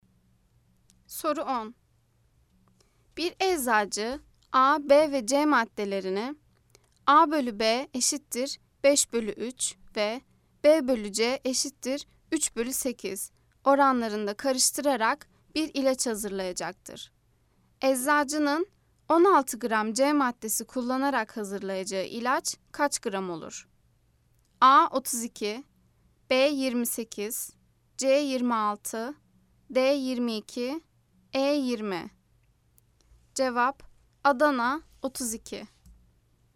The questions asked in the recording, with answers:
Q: Eczacının 16 gram C maddesi kullanarak hazırlayacağı ilaç kaç gram olur?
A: Cevap Adana 32.